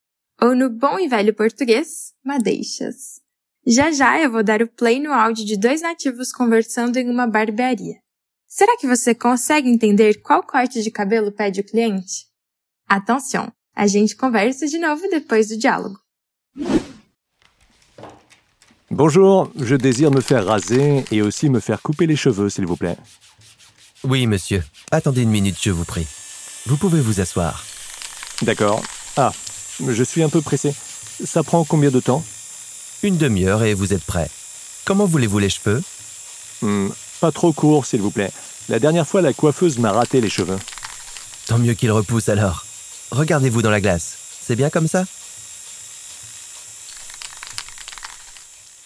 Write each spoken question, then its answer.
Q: Será que você consegue entender qual corte de cabelo pede o cliente?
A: não muito curto, por favor.